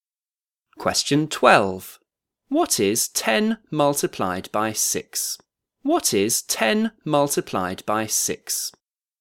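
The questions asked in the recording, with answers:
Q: What is 10 multiplied by 6?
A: 60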